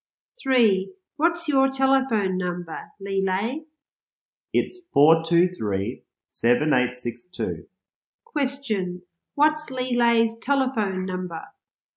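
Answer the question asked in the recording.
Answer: 423-7862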